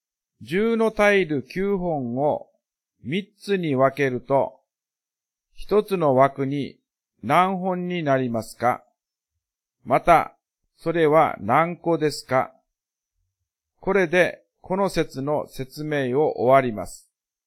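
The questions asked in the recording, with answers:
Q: 十のタイル九本を三つに分けると、一つの枠に何本になりますか?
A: 3本

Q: また、それは何個ですか?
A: 30個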